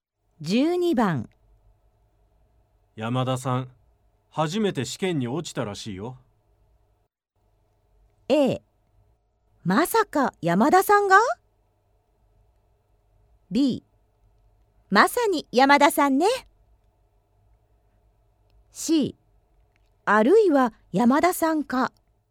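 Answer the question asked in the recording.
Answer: A: まさか山田さんが?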